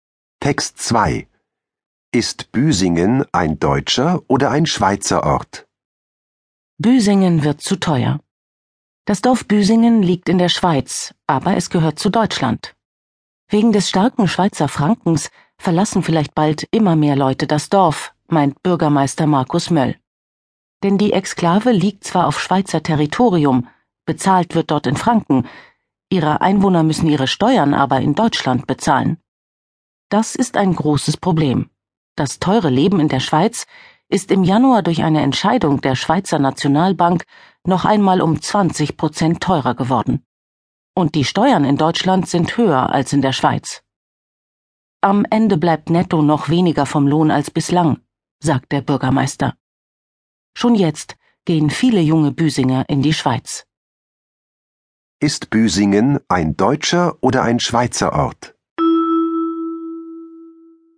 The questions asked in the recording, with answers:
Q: Ist Büsingen ein deutscher oder ein Schweizer Ort?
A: Büsingen ist ein deutscher Ort.